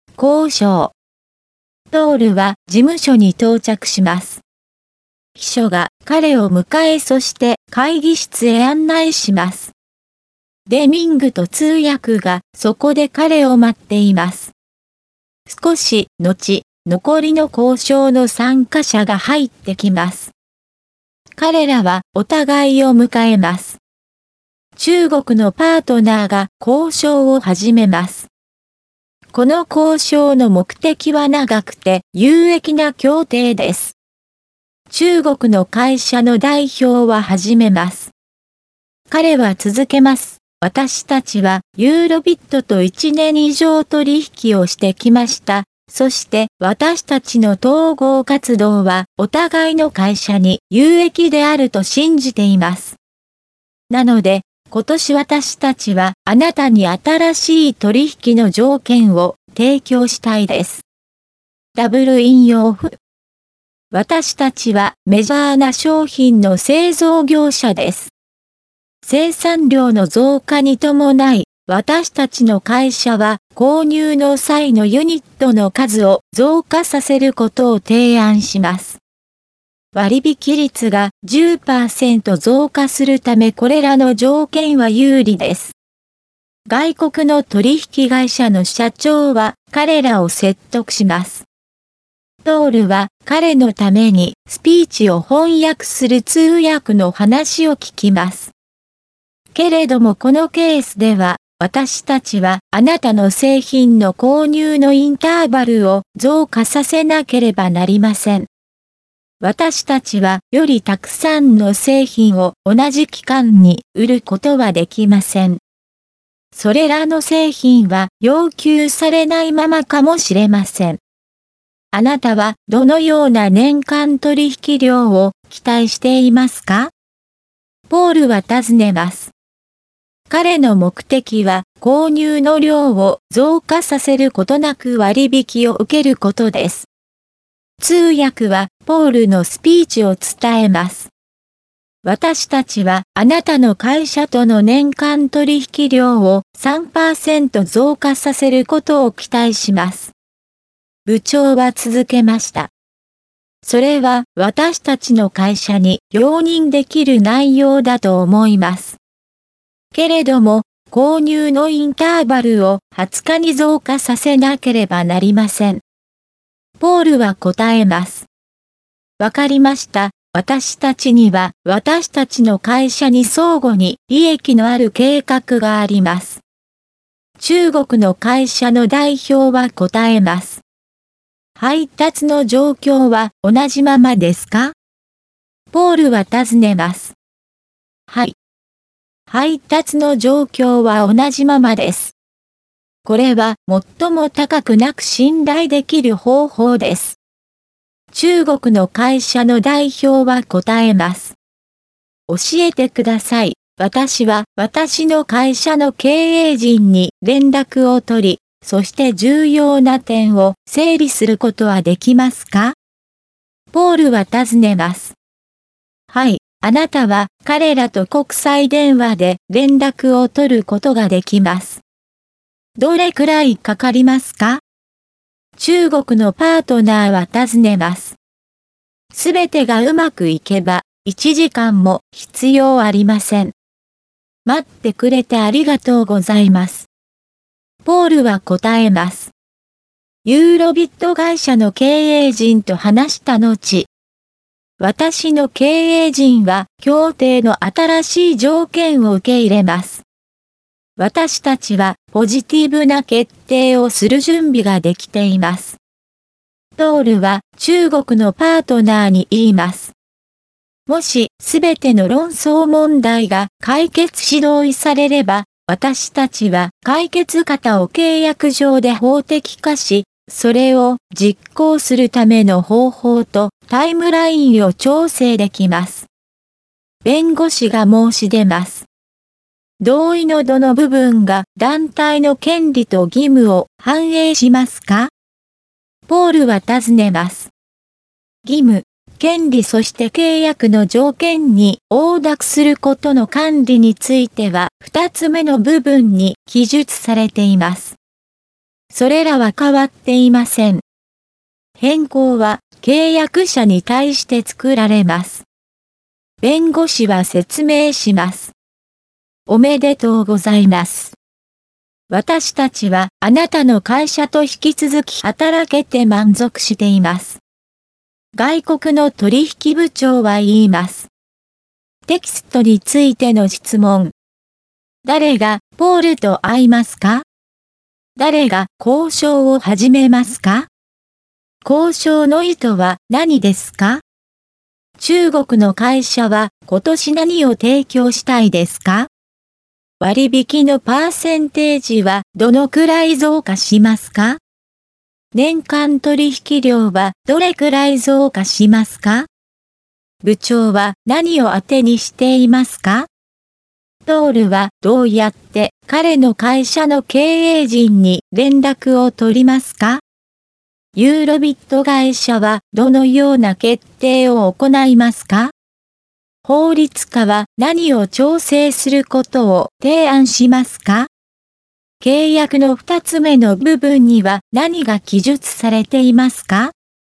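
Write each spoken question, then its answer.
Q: 誰が交渉を始めますか?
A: 中国のパートナー

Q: 交渉の意図は何ですか?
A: 長くて有益な協定

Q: 中国の会社は今年何を提供したいですか?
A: 新しい取引の条件

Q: 割引のパーセンテージはどのくらい増加しますか?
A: 10%

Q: トールはどうやって彼の会社の経営陣に連絡を取りますか?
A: 国際電話で

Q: ユーロビット会社はどのような決定を行いますか?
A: 協定の新しい条件を受け入れる(ポジティブな決定)

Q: 法律家は何を調整することを提案しますか?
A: 解決方を実行するための方法とタイムライン

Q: 契約の二つ目の部分には何が記述されていますか?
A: 義務、権利、契約の条件に応諾することの管理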